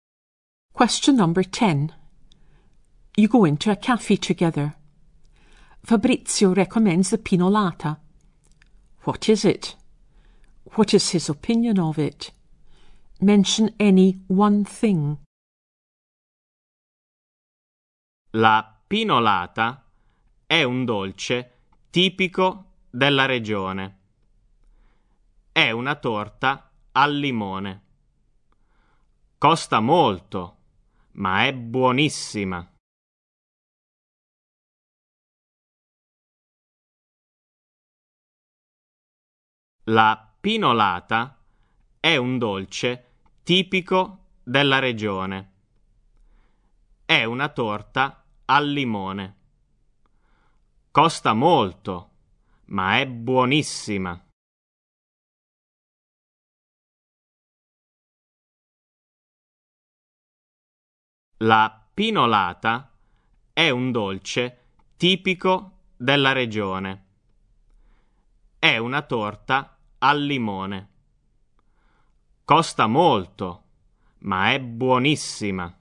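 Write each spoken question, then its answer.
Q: What is it?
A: A typical local lemon cake

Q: What is his opinion of it?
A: It is expensive but delicious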